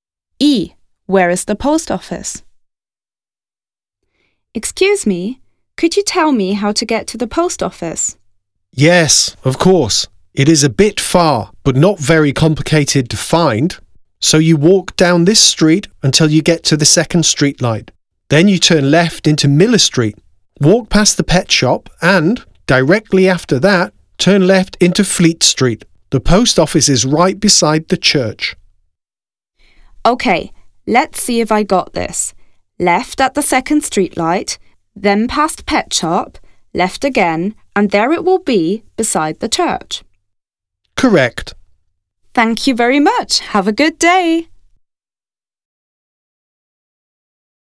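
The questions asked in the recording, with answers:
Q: Where is the post office?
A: On Fleet Street, beside the church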